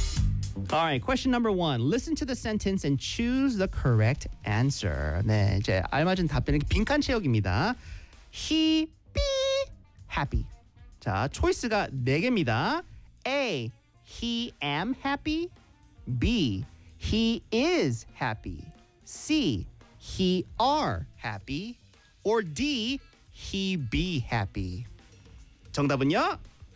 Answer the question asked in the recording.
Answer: That's right. 정답은 B. He is happy.